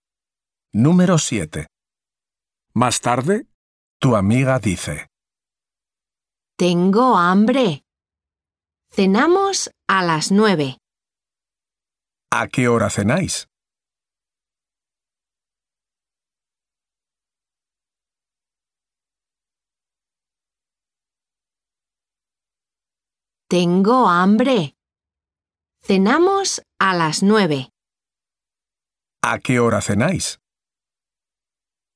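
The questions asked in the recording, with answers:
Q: ¿A qué hora cenáis?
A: A las 9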